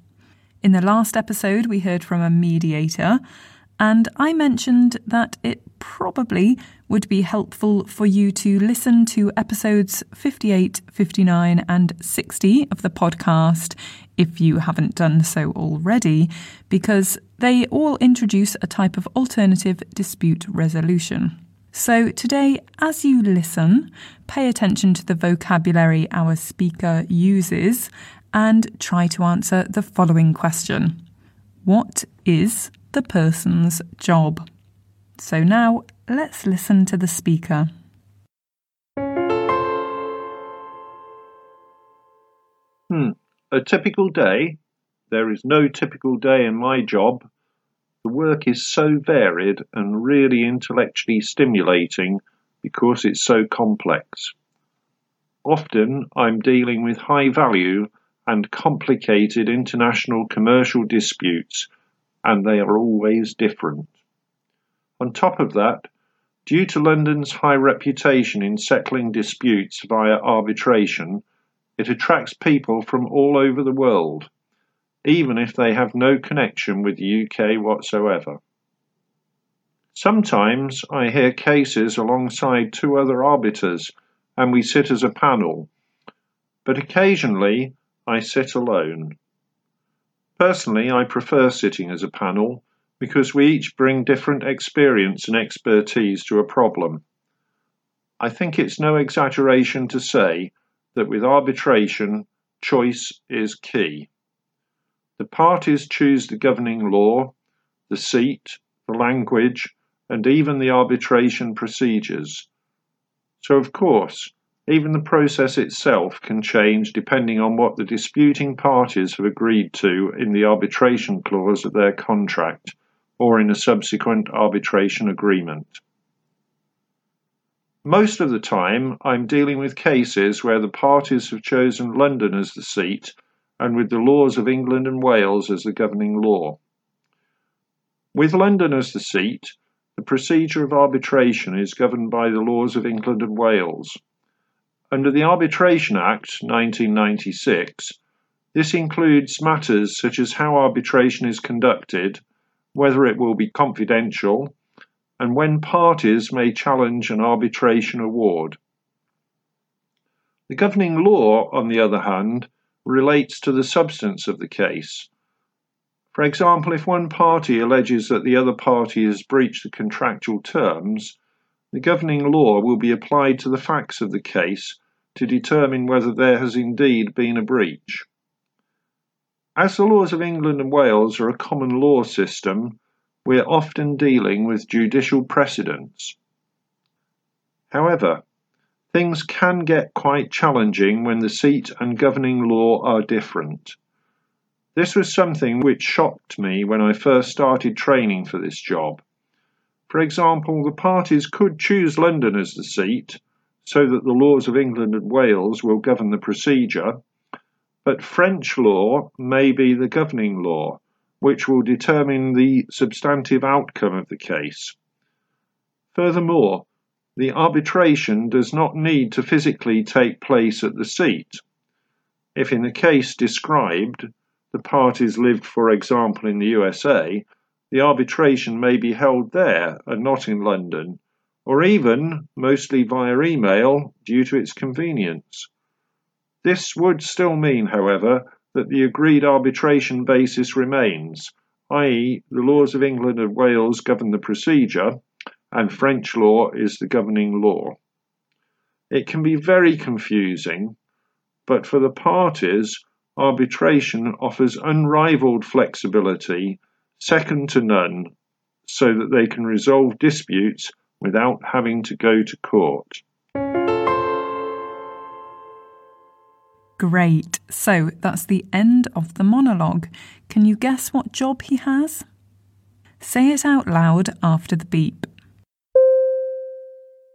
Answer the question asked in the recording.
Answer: Of course, he's an arbitrator.